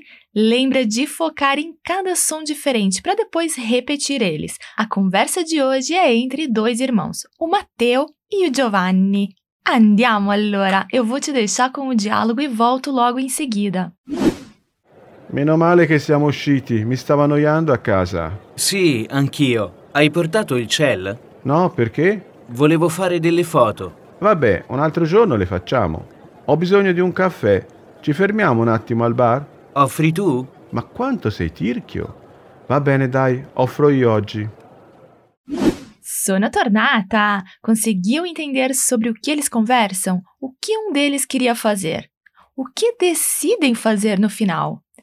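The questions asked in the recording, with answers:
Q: O que um deles queria fazer?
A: Tirar umas fotos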